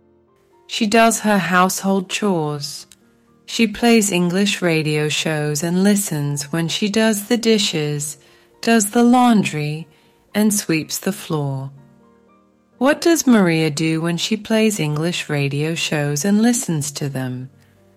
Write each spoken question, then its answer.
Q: What does Maria do when she plays English radio shows and listens to them?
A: She does the dishes, does the laundry, and sweeps the floor.